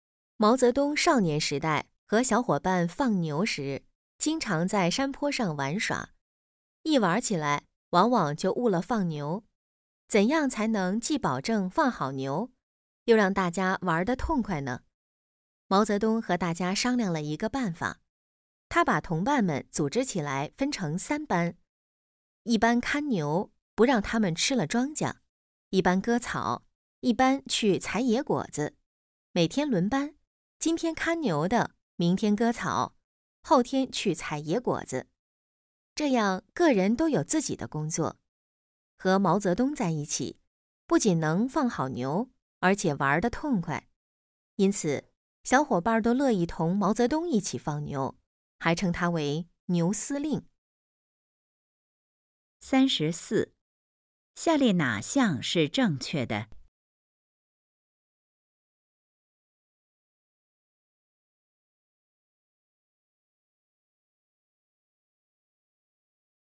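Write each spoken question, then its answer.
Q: 毛泽东把同伴们分成几班?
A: 3班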